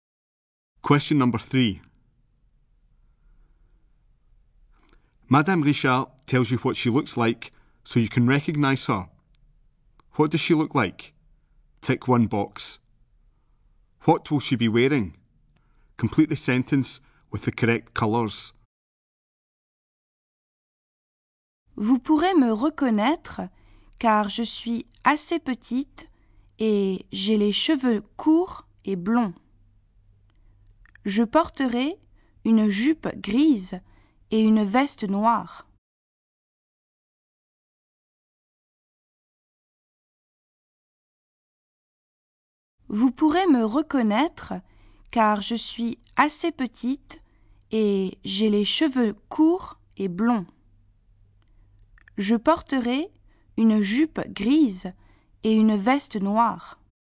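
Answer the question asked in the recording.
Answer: A grey skirt and a black jacket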